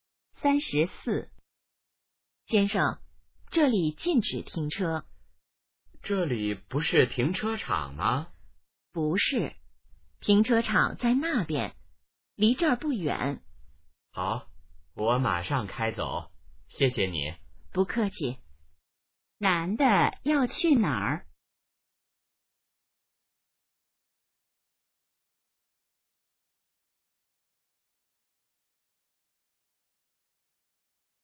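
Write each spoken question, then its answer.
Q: 男的要去哪儿?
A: 停车场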